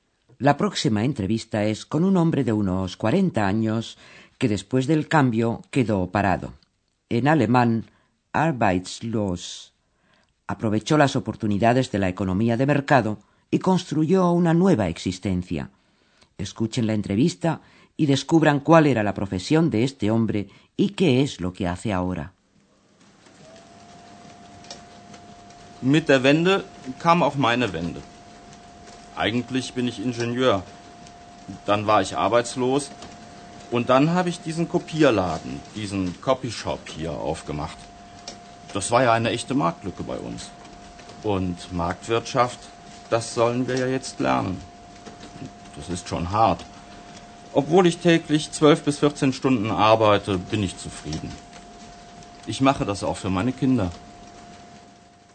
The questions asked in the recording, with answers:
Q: descubran cuál era la profesión de este hombre y qué es lo que hace ahora.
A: El hombre era, antes del cambio, ingeniero.